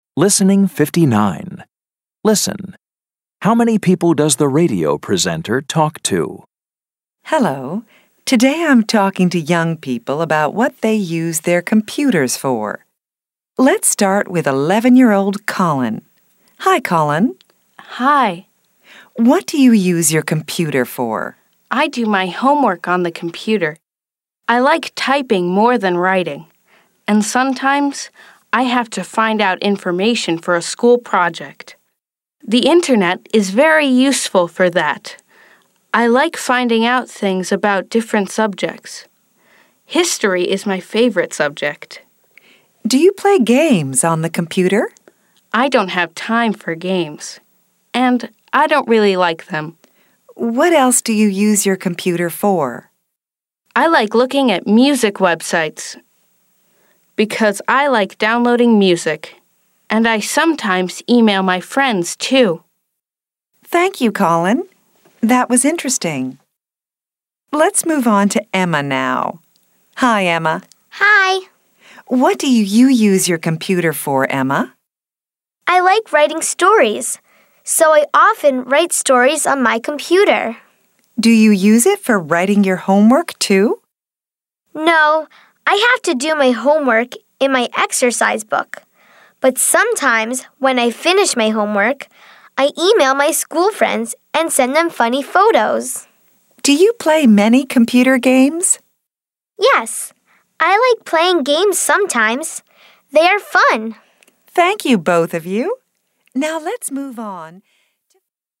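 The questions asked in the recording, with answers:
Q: How many people does the radio presenter talk to?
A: Two (Colin and Emma)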